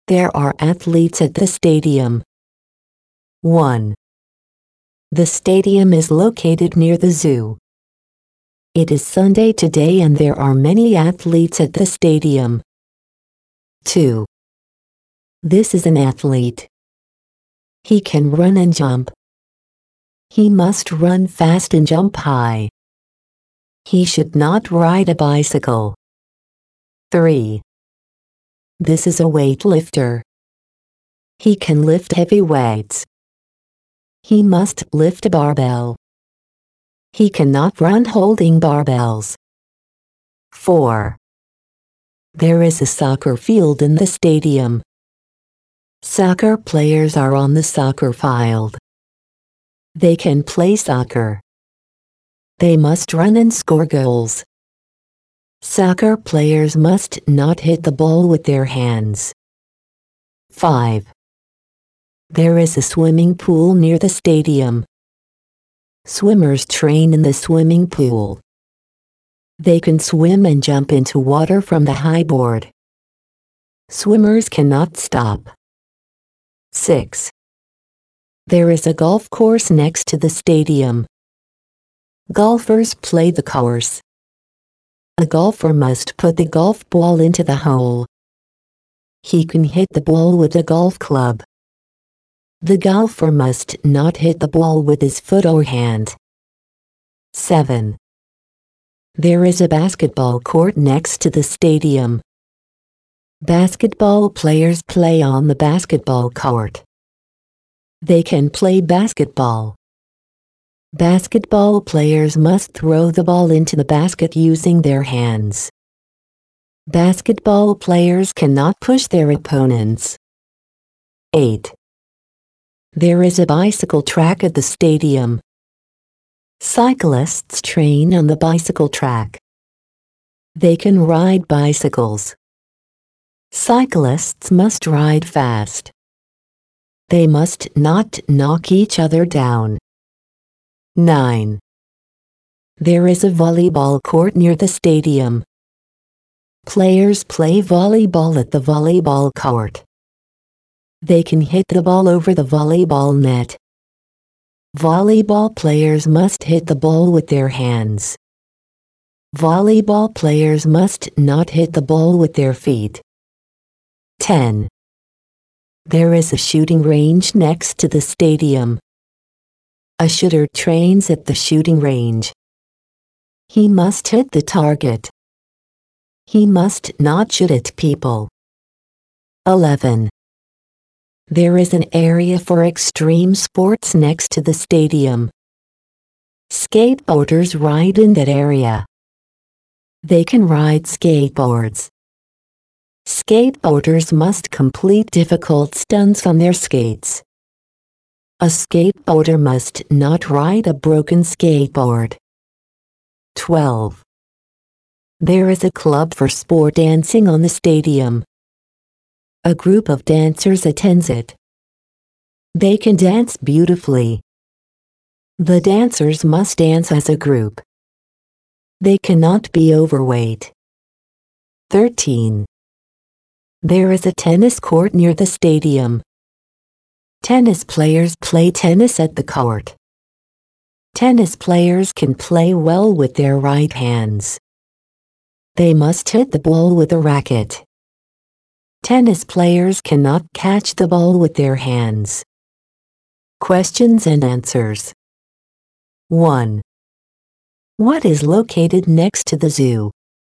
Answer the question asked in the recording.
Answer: A stadium is located next to the zoo.